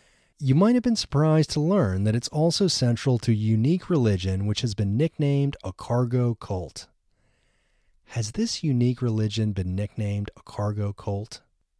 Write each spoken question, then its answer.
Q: Has this unique religion been nicknamed a cargo cult?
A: Yes, this unique religion has been nicknamed a cargo cult.